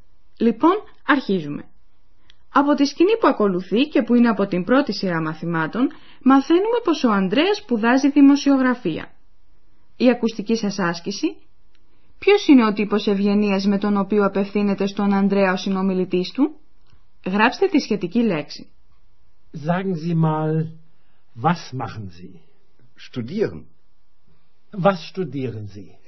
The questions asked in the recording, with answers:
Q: Ποιος είναι ο τύπος ευγενίας με τον οποίο απευθύνεται στον Ανδρέα ο συνομιλητής του?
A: Το πρώτο που έπρεπε να μαντέψετε ήταν ο ευγενικός τύπος προσφώνησης, δηλαδή το «ζι», «σις».